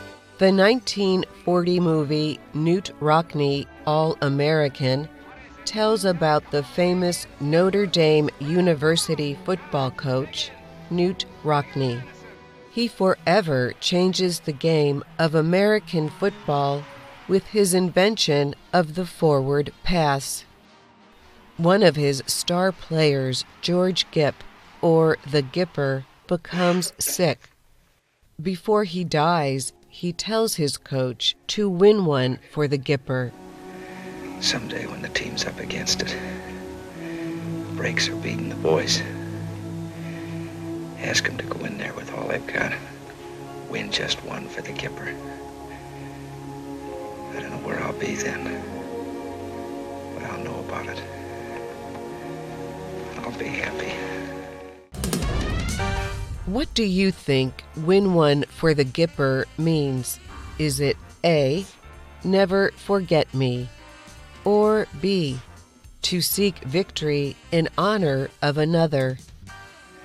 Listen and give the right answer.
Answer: The answer is B to seek victory in honor of another.